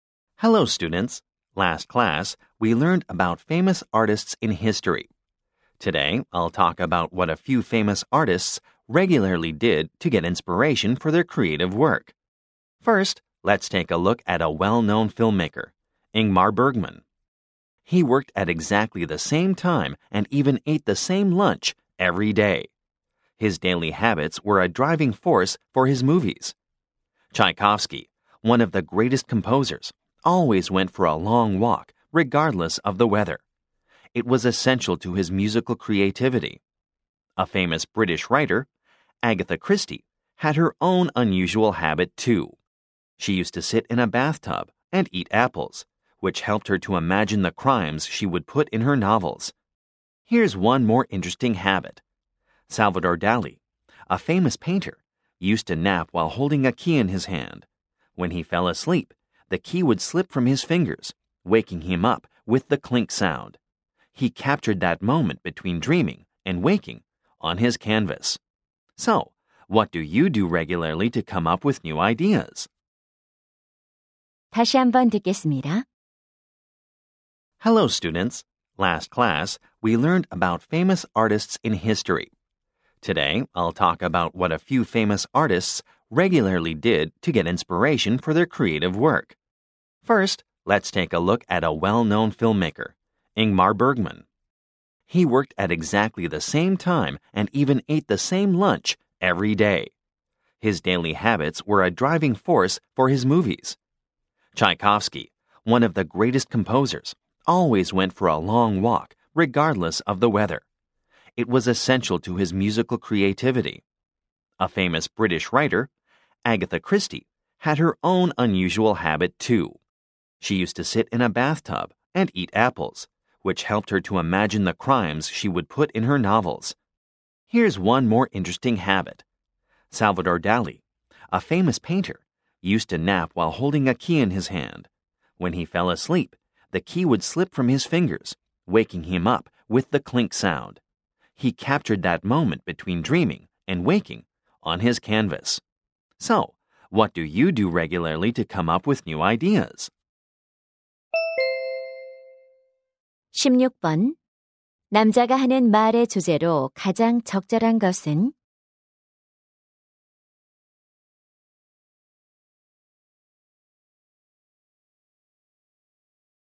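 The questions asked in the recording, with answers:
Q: 남자가 하는 말의 주제로 가장 적절한 것은?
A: 유명 예술가들이 영감을 얻기 위해 규칙적으로 한 습관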